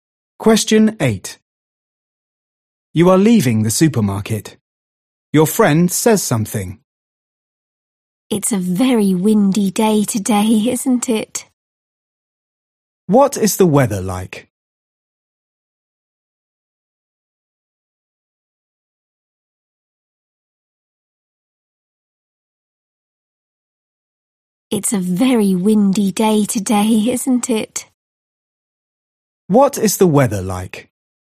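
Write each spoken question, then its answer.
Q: What is the weather like?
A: very windy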